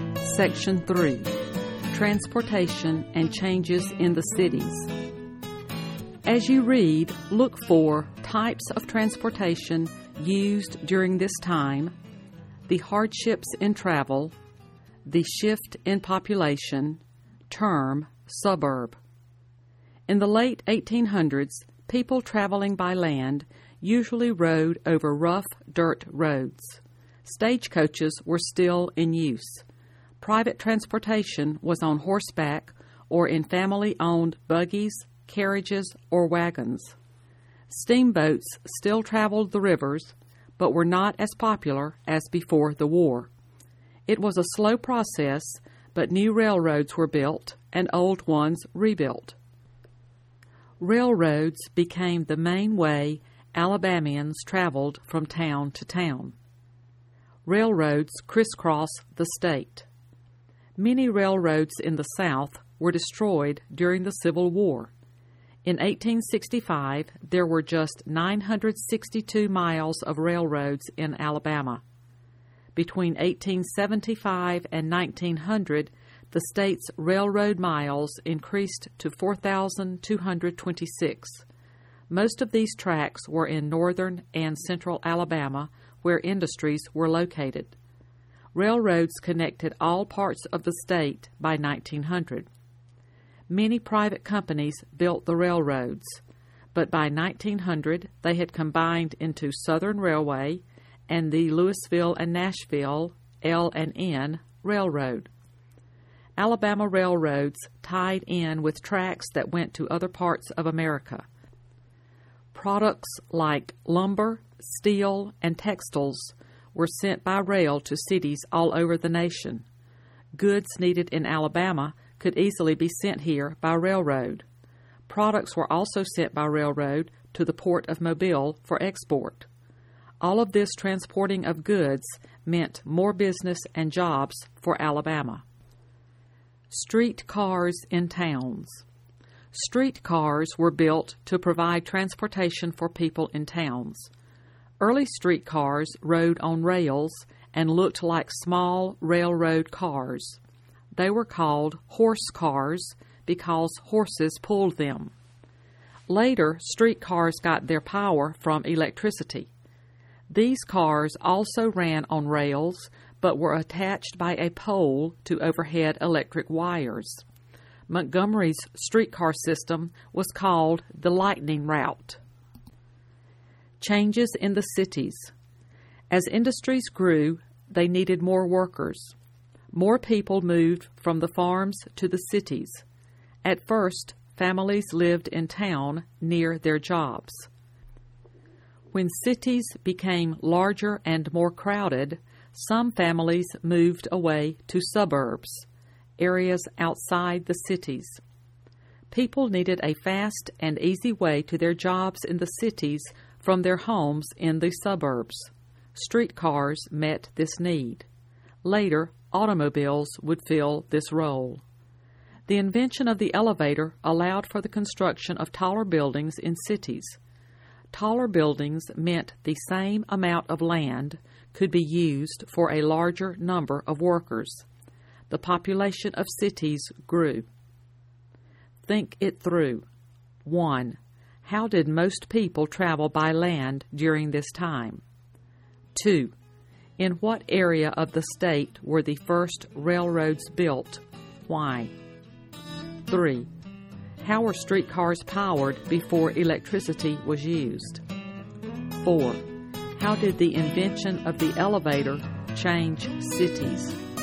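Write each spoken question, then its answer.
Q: In what area of the state were the first railroads built?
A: Northern and central Alabama, where industries were located

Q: How were streetcars powered before electricity was used?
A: By horses

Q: How did the invention of the elevator change cities?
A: It allowed taller buildings, so more workers could use the same land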